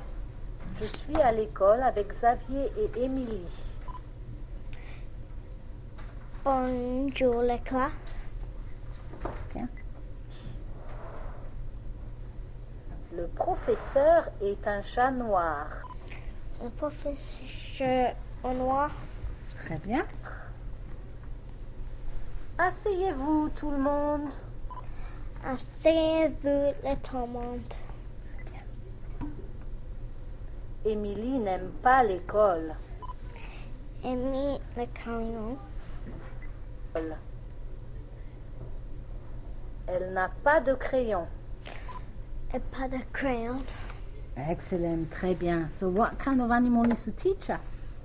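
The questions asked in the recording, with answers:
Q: So what kind of animal is the teacher?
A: A black cat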